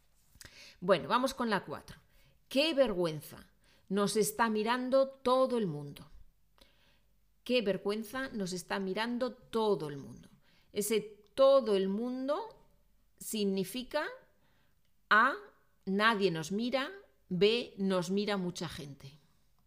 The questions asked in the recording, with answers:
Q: Ese todo el mundo significa A, nadie nos mira, B, nos mira mucha gente.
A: Pues B, ¿no? B es correcto.